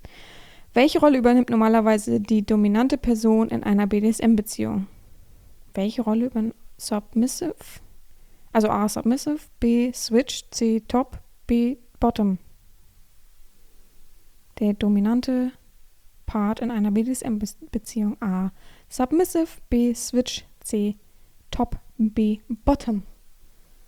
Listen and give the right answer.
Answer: Antwort 4 ist C, Top.